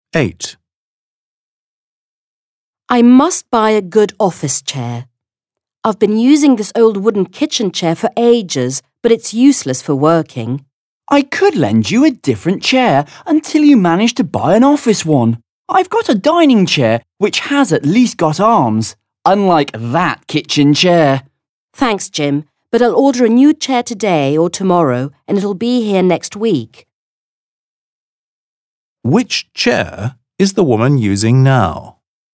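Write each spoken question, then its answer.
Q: Which chair is the woman using now?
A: an old wooden kitchen chair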